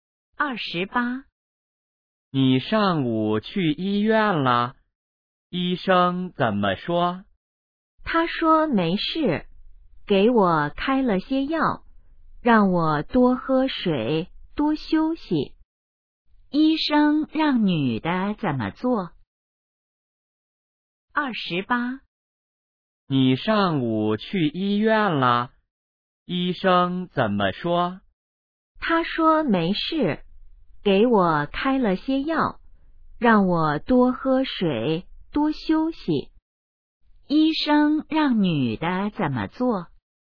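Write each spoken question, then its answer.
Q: 医生让女的怎么做?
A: 吃药,多喝水,多休息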